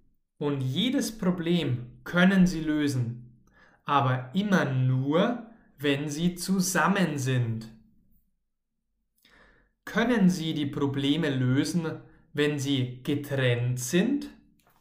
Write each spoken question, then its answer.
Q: Können Sie die Probleme lösen, wenn Sie getrennt sind?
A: Nein, nicht wenn Sie getrennt sind, sondern wenn Sie zusammen sind.